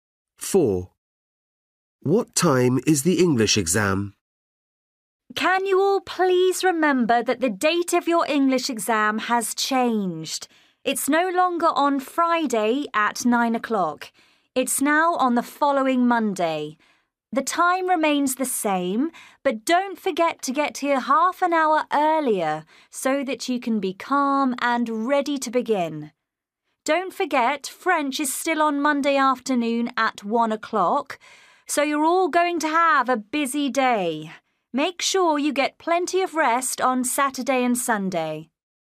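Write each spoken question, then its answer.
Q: What time is the English exam?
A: 9 o'clock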